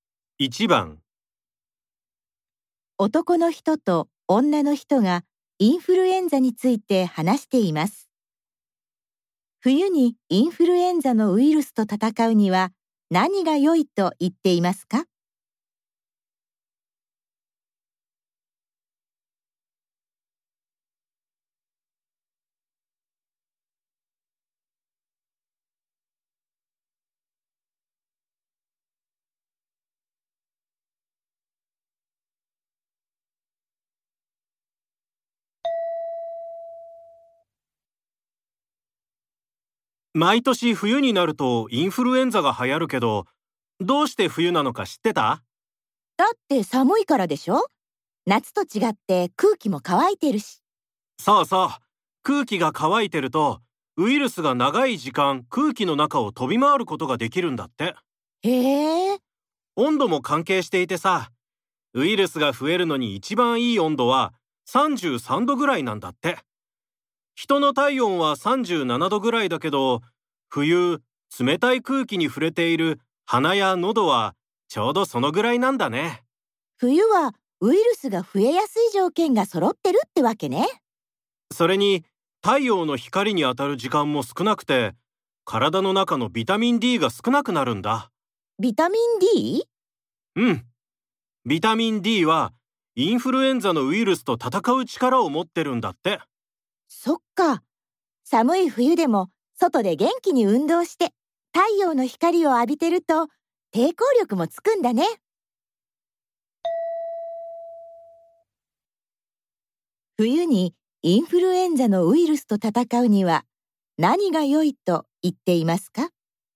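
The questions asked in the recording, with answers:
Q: 冬にインフルエンザのウイルスと戦うには何が良いと言っていますか?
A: 外で運動して太陽の光を浴びること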